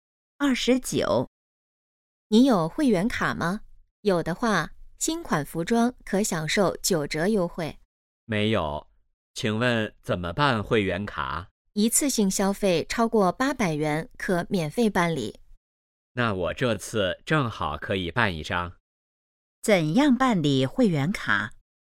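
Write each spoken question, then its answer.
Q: 怎样办理会员卡?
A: 一次性消费超过800元可免费办理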